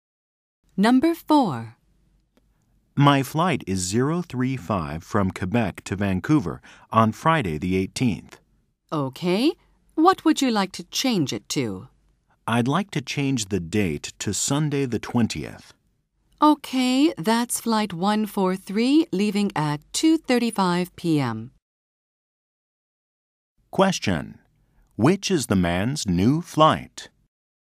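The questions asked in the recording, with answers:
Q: Which is the man's new flight?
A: Flight 143 on Sunday the 20th, leaving at 2:35 p.m.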